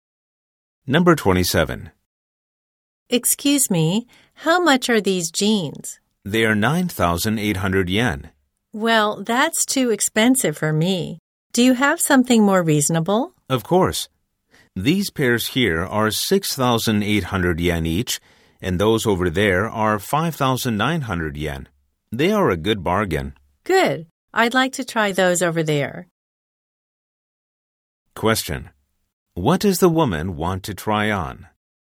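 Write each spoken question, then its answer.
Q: What does the woman want to try on?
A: The jeans over there that cost 5,900 yen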